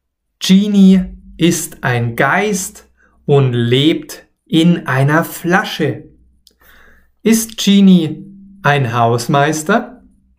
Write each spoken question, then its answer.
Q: Ist Genie ein Hausmeister?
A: Nein, er ist kein Hausmeister.